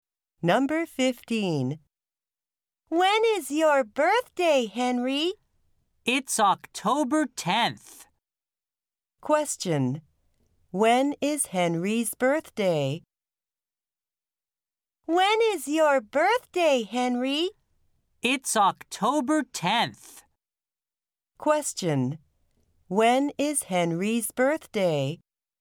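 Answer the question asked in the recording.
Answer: October 10th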